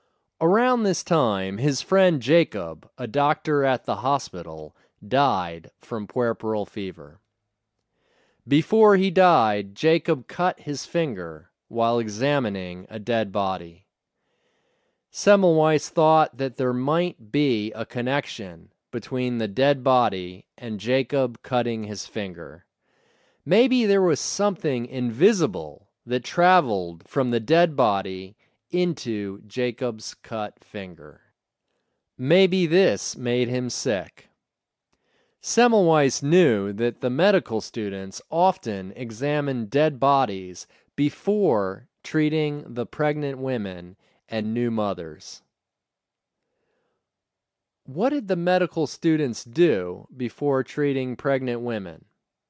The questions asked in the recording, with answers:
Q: What did the medical students do before treating pregnant women?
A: The medical students examined dead bodies before treating the pregnant women.